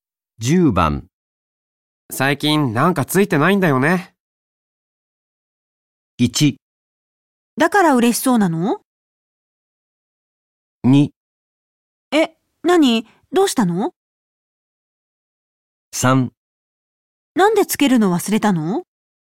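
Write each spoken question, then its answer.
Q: 最近なんかついてないんだよね。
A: 2: え、何どうしたの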